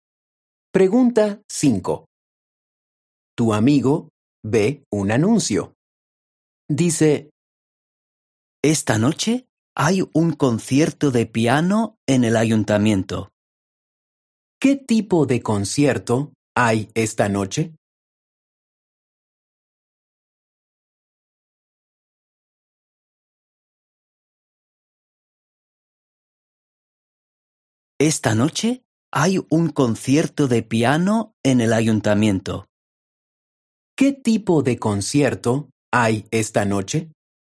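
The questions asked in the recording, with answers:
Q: ¿Qué tipo de concierto hay esta noche?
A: Un concierto de piano.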